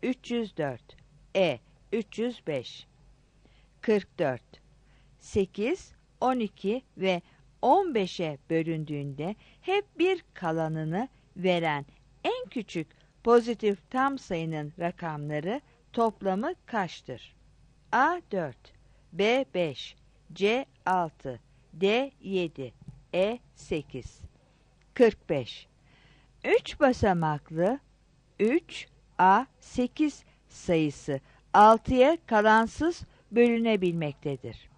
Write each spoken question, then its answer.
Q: 8, 12 ve 15'e bölündüğünde hep bir kalanını veren en küçük pozitif tam sayının rakamları toplamı kaçtır?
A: 44 A